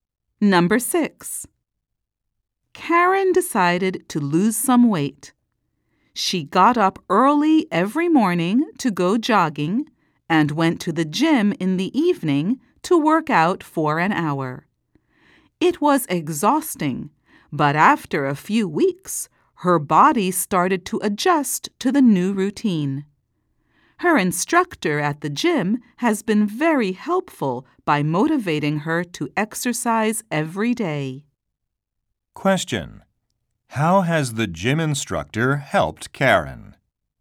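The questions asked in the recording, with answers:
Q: How has the gym instructor helped Karen?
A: By motivating her to exercise every day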